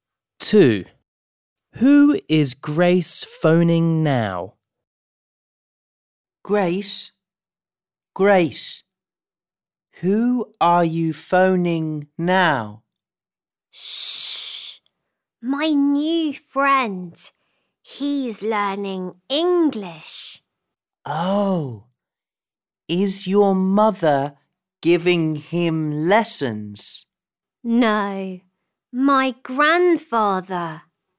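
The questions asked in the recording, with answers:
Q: Who is Grace phoning now?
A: Her new friend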